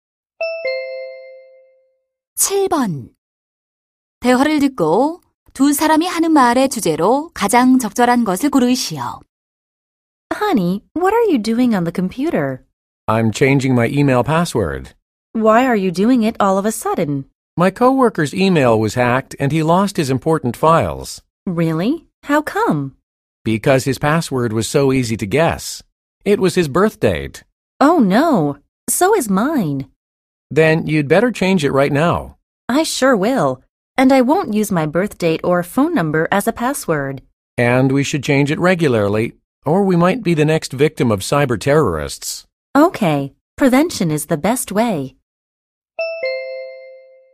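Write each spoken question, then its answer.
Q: 대화를 듣고 두 사람이 하는 말의 주제로 가장 적절한 것을 고르시오.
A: 해킹 예방을 위한 비밀번호 관리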